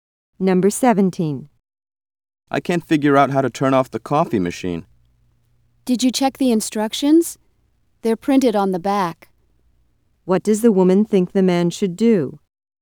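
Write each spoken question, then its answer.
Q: What does the woman think the man should do?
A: Read the instructions on the back of the machine.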